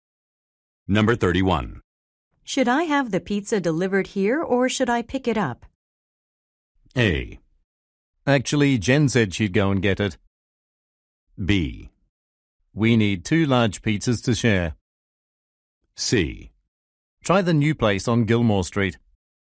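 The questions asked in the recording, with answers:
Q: Should I have the pizza delivered here or should I pick it up?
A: A: Actually, Jen said she'd go and get it.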